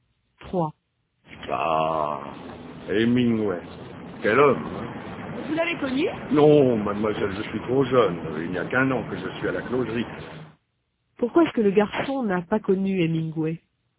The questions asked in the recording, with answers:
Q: Pourquoi est-ce que le garçon n'a pas connu Hemingway?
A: Parce qu'il est trop jeune.